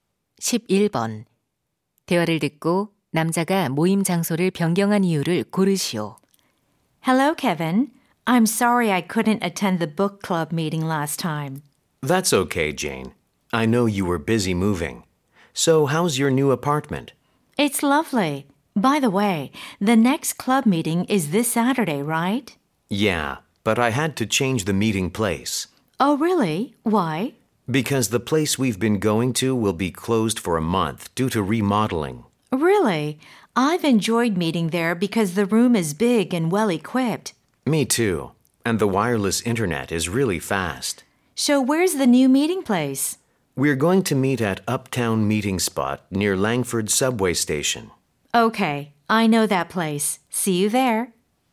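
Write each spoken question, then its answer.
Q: 대화를 듣고 남자가 모임 장소를 변경한 이유를 고르시오.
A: 기존 장소가 리모델링으로 한 달간 문을 닫아서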